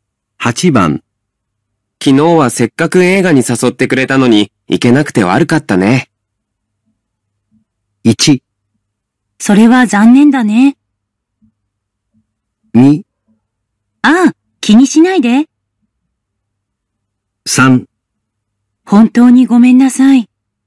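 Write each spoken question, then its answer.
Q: 昨日はせっかく映画に誘ってくれたのに、行けなくて悪かったね。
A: 2: ああ、気にしないで。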